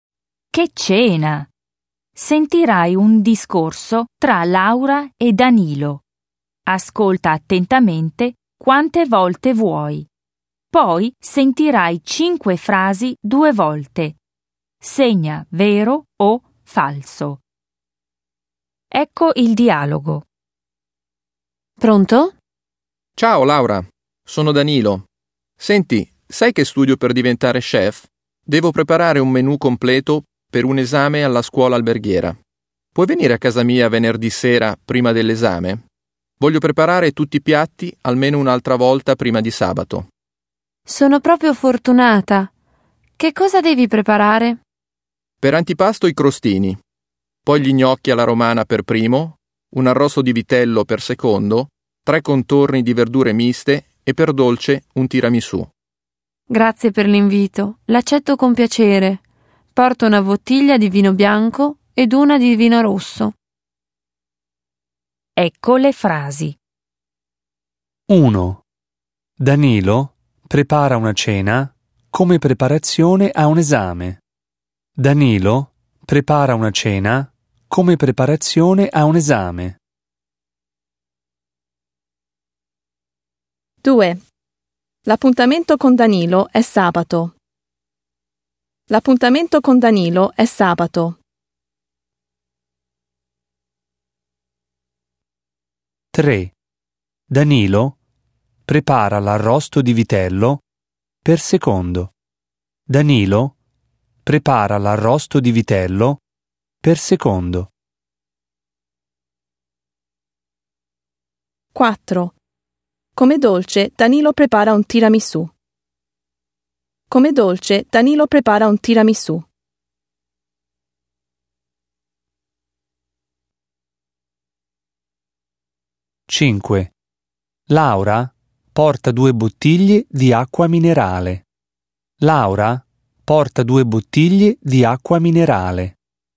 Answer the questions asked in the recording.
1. 1. Vero.
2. 2. Falso.
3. 3. Vero.
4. 4. Vero.
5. 5. Falso.